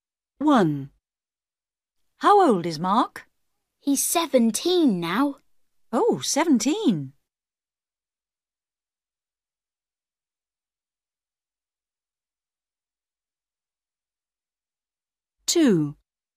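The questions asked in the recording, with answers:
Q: How old is Mark?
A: 17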